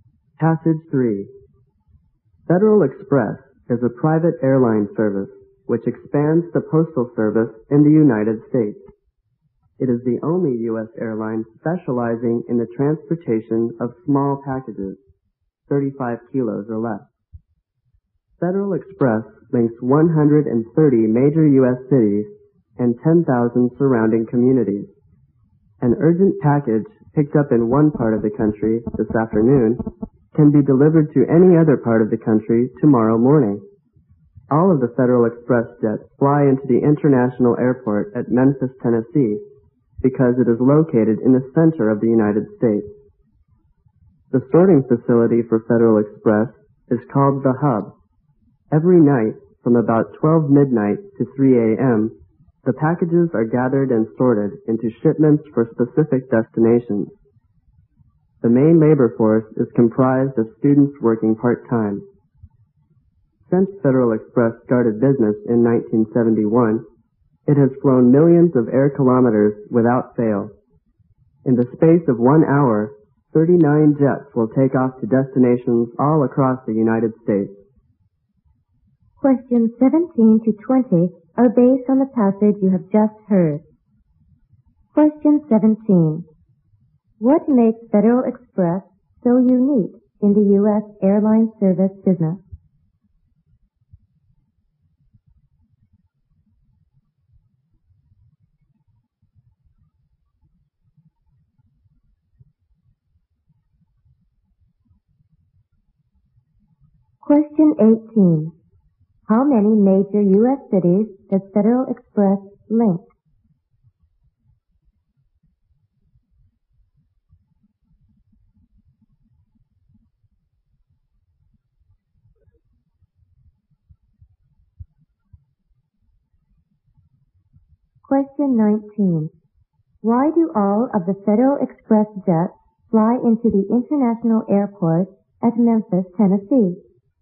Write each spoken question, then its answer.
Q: What makes Federal Express so unique in the U.S. airline service business?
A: It specialization in transporting small packages

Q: Why do all of the Federal Express jets fly into the International Airport at Memphis, Tennessee?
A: Because of its location in the country